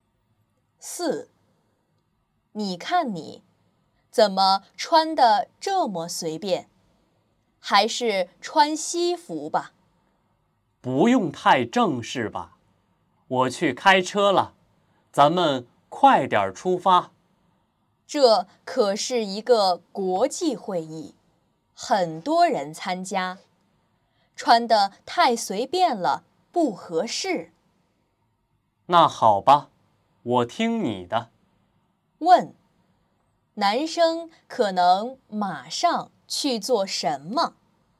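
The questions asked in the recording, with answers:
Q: 问,男生可能马上去做什么?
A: 换西服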